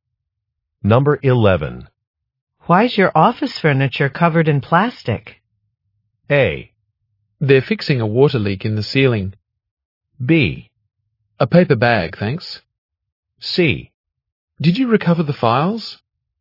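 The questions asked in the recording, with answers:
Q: Why's your office furniture covered in plastic?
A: A: They're fixing a water leak in the ceiling.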